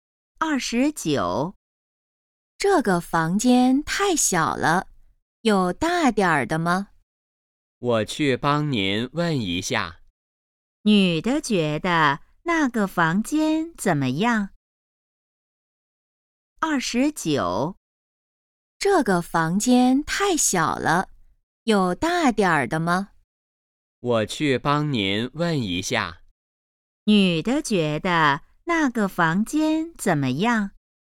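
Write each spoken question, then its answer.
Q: 女的觉得那个房间怎么样?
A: 太小了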